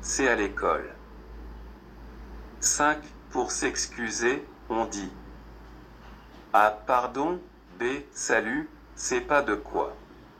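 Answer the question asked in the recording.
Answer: A: Pardon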